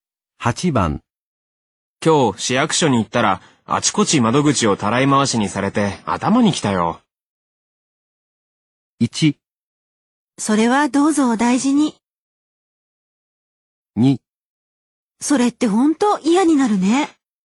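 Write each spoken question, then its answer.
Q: 今日市役所に行ったら、あちこち窓口をたらい回しにされて頭にきたよ。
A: 2: それってほんと嫌になるね。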